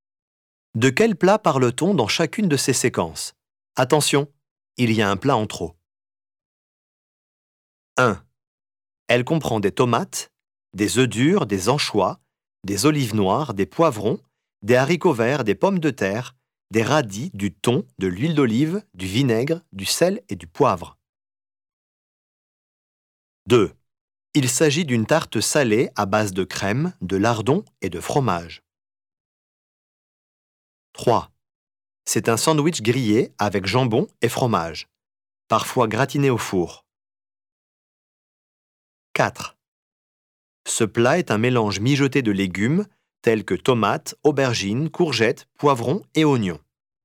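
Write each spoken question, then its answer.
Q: Elle comprend des tomates, des œufs durs, des anchois, des olives noires, des poivrons, des haricots verts, des pommes de terre, des radis, du thon, de l'huile d'olive, du vinaigre, du sel et du poivre.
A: la salade niçoise

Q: Il s'agit d'une tarte salée à base de crème, de lardons et de fromage.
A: la quiche lorraine

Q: C'est un sandwich grillé avec jambon et fromage, parfois gratiné au four.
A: le croque-monsieur

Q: Ce plat est un mélange mijoté de légumes tels que tomates, aubergines, courgettes, poivrons et oignons.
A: la ratatouille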